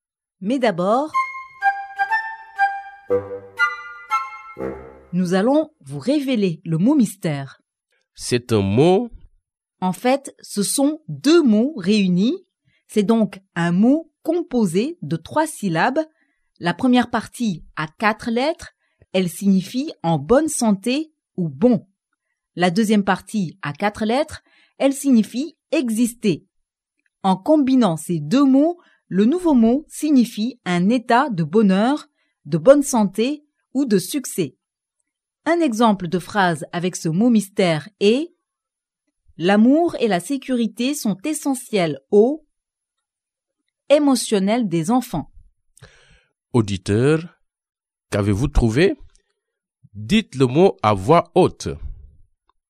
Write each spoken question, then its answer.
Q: Auditeur, qu'avez-vous trouvé?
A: Le mot mystère d'aujourd'hui est « bien-être ».